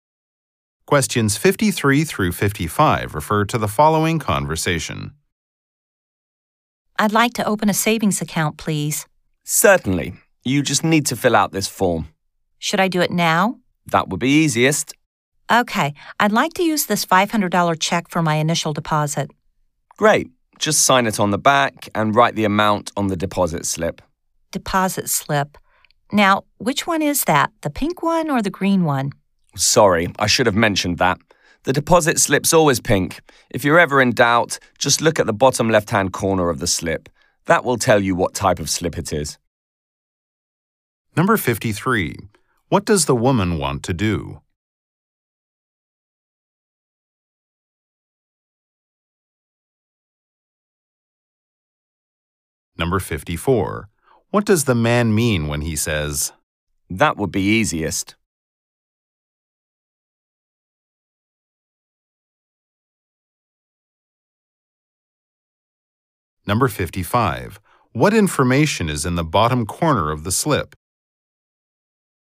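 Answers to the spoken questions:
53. Open a savings account
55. The type of slip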